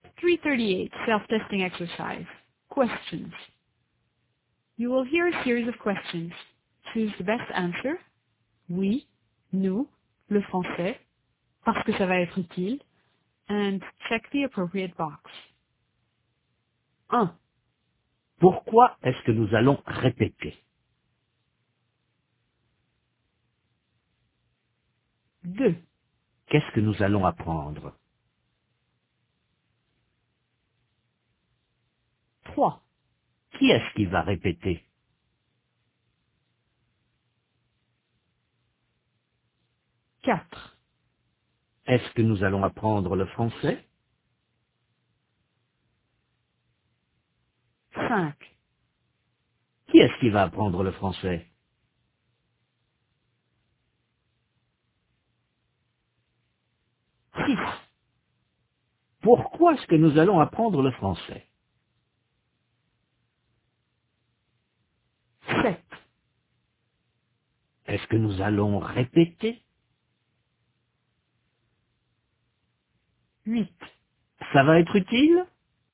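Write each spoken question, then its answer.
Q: Pourquoi est-ce que nous allons répéter?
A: parce que ça va être utile

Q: Qu'est-ce que nous allons apprendre?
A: le français

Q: Qui est-ce qui va répéter?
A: nous

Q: Est-ce que nous allons apprendre le français?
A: oui

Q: Qui est-ce qui va apprendre le français?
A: nous

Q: Pourquoi est-ce que nous allons apprendre le français?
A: parce que ça va être utile

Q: Est-ce que nous allons répéter?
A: oui

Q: Ça va être utile?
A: oui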